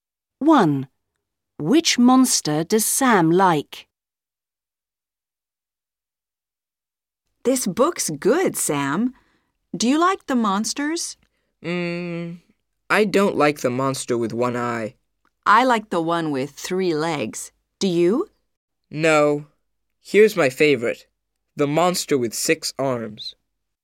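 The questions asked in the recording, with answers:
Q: Which monster does Sam like?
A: The monster with six arms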